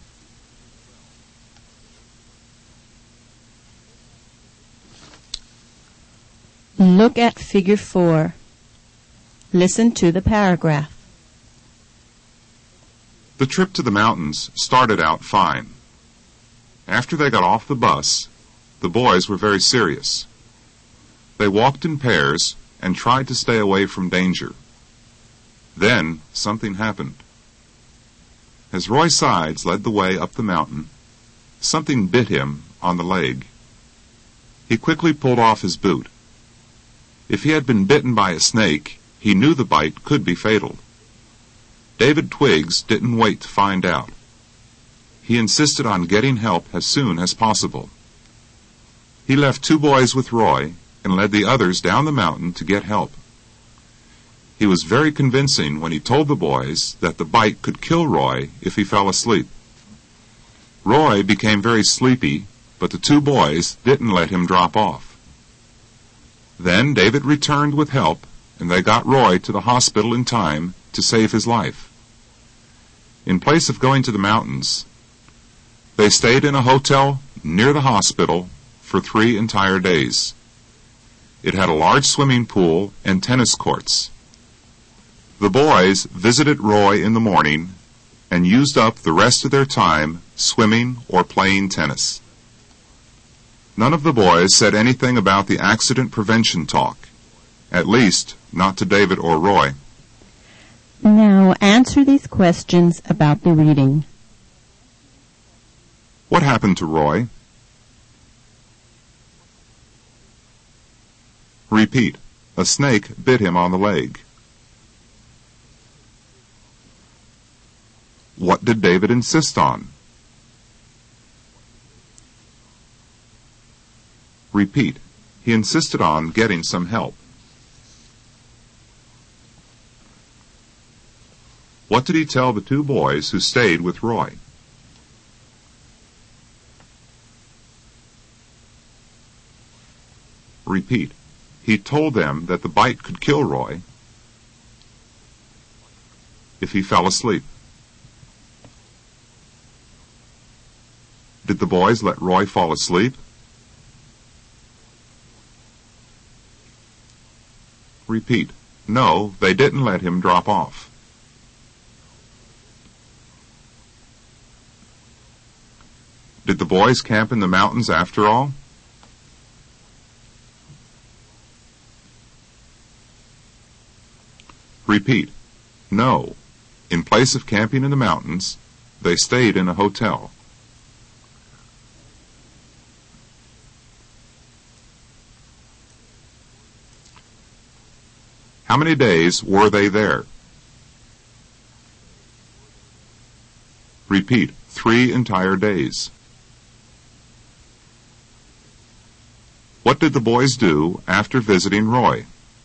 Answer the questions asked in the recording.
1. a snake bit him on the leg.
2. he insisted on getting some help.
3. he told them that the bite could kill Roy
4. no, they didn't let him drop off.
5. no. In place of camping in the mountains, they stayed in a hotel.
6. 3 entire days.
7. they used up the rest of their time